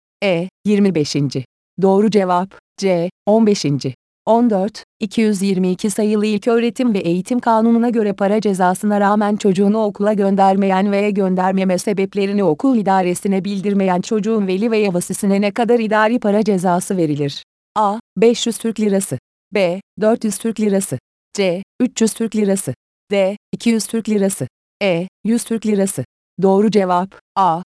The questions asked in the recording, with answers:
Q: 222 sayılı İlköğretim ve Eğitim Kanunu'na göre para cezasına rağmen çocuğunu okula göndermeyen veya göndermeme sebeplerini okul idaresine bildirmeyen çocuğun veli veya vasisine ne kadar idari para cezası verilir?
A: Doğru cevap, A.